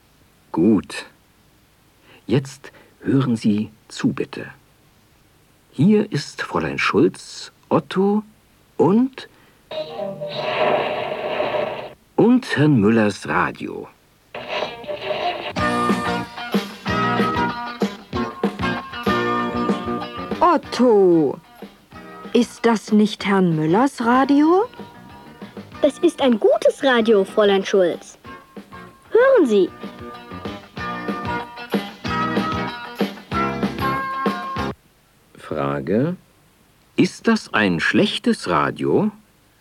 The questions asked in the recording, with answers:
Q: Ist das ein schlechtes Radio?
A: Nein, das ist kein schlechtes Radio.